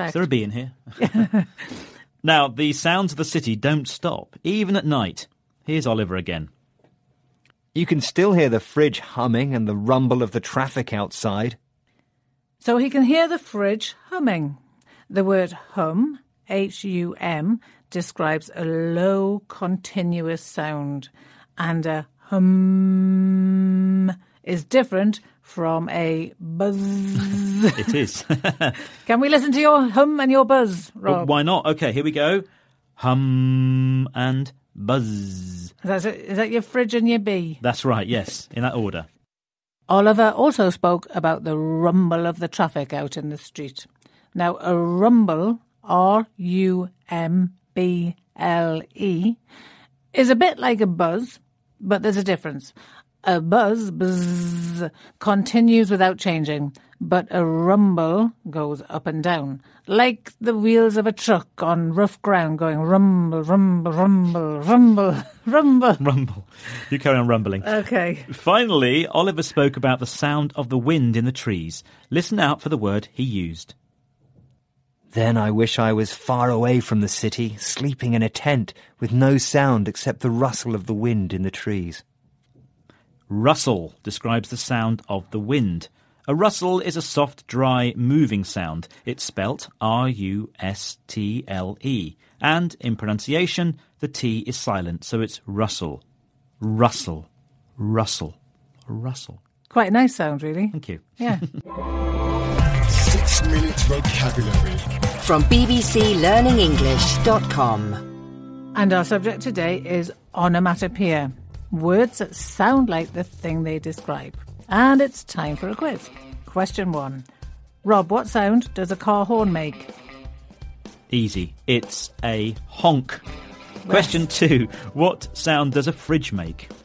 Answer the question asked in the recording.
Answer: And it's hum.